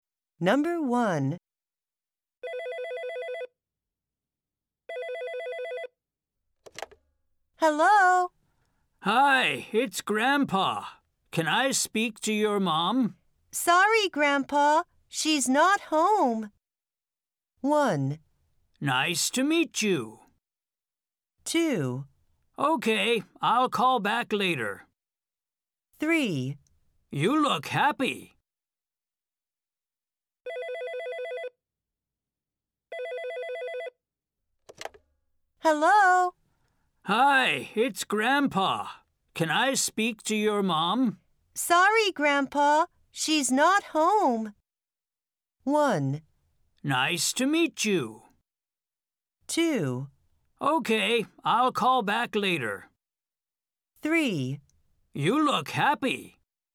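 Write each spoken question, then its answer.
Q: Sorry, Grandpa. She's not home.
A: 2: Okay, I'll call back later.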